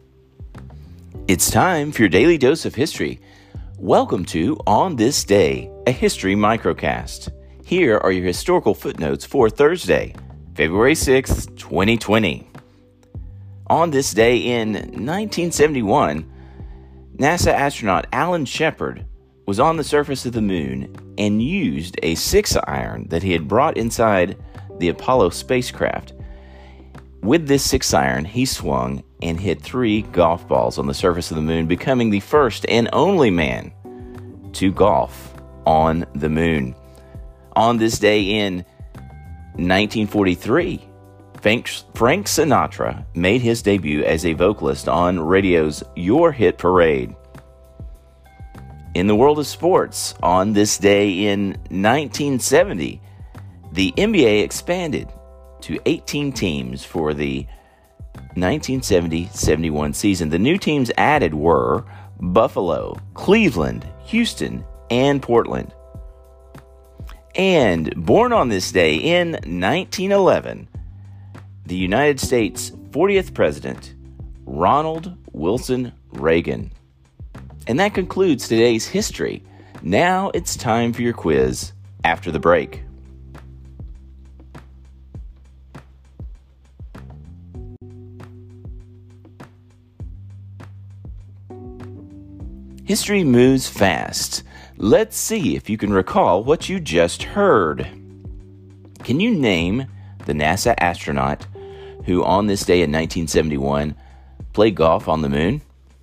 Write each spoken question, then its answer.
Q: Can you name the NASA astronaut who on this day in 1971 played golf on the moon?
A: Answer, the astronaut was Alan Shepard.